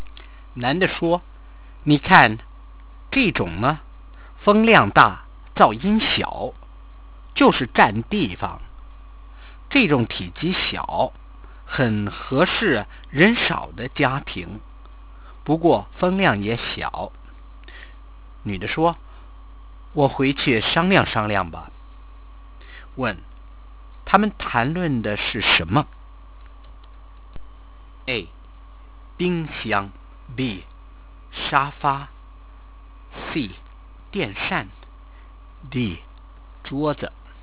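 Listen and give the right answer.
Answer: C: 电扇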